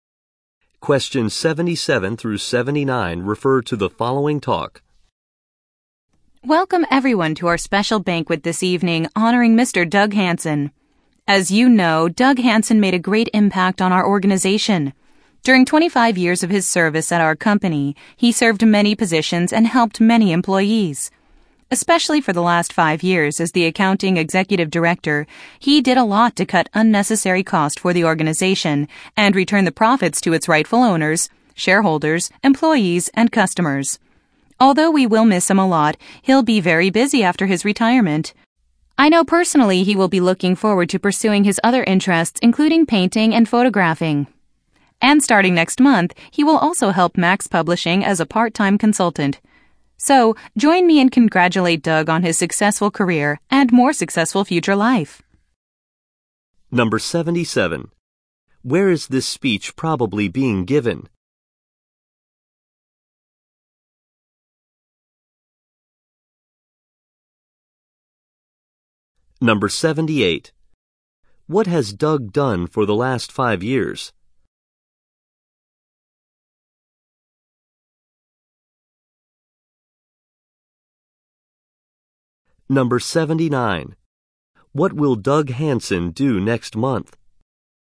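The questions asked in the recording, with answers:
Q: Where is this speech probably being given?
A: At a retirement banquet honoring Doug Hansen

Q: What has Doug done for the last 5 years?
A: As accounting executive director, he cut unnecessary costs

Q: What will Doug Hansen do next month?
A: Work as a part-time consultant for Max Publishing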